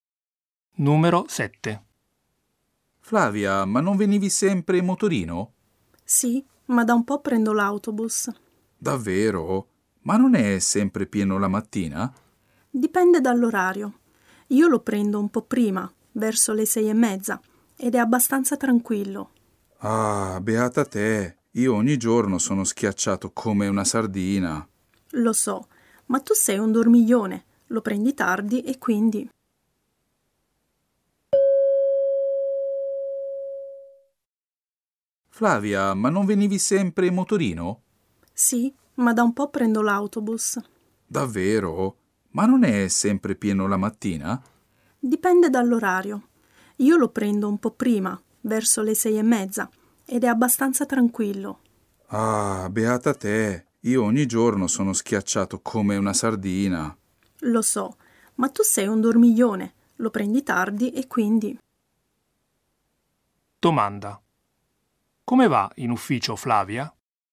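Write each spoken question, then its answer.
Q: Come va in ufficio Flavia?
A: In autobus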